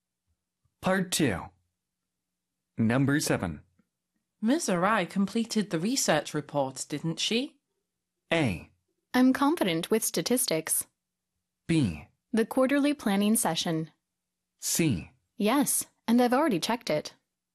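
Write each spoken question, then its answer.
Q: Ms. Arai completed the research report, didn't she?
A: C: Yes, and I've already checked it.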